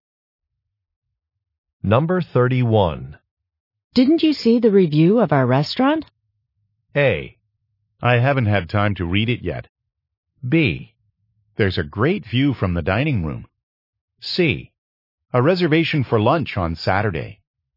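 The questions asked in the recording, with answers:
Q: Didn't you see the review of our restaurant?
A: A: I haven't had time to read it yet.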